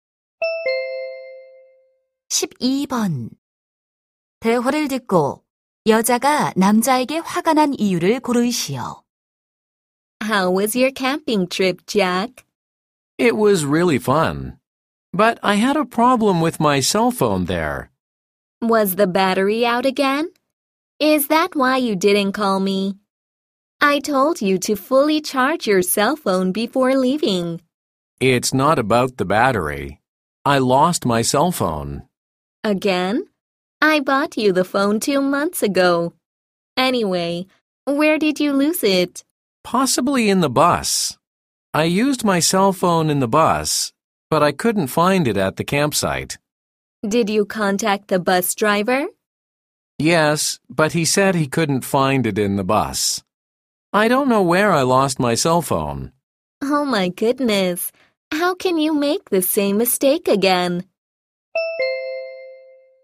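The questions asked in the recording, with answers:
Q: 대화를 듣고 여자가 남자에게 화가 난 이유를 고르시오.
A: 남자가 또 휴대전화를 잃어버려서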